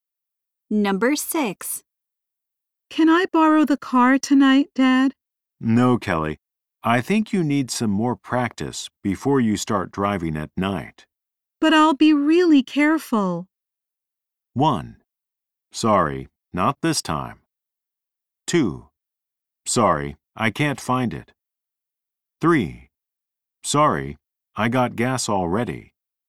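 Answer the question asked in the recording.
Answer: 1: Sorry, not this time.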